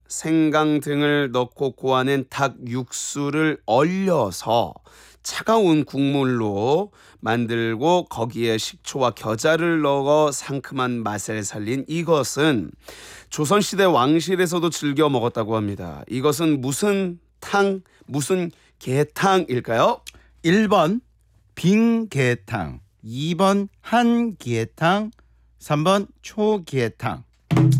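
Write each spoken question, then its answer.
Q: 이것은 무슨 탕, 무슨 계탕일까요?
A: 3번: 초계탕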